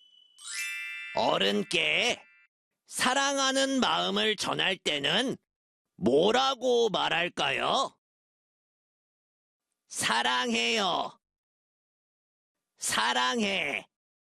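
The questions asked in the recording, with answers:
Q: 어른께 사랑하는 마음을 전할 때는 뭐라고 말할까요?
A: 사랑해요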